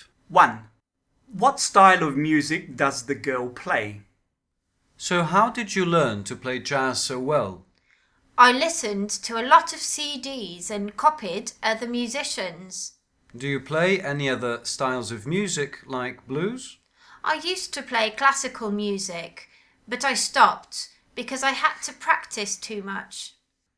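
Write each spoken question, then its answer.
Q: What style of music does the girl play?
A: jazz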